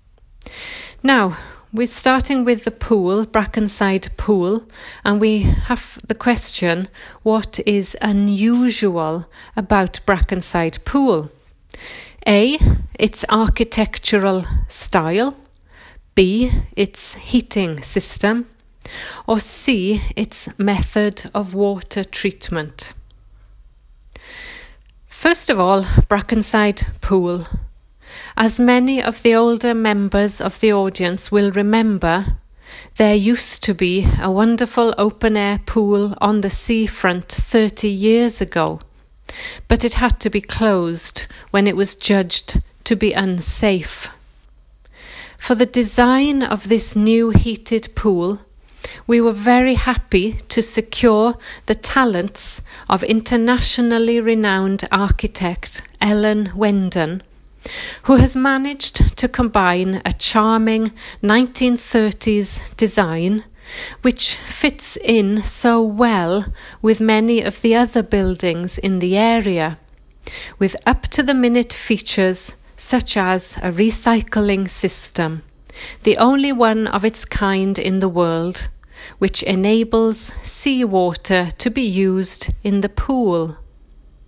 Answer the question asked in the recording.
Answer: So the answer for 12 is C.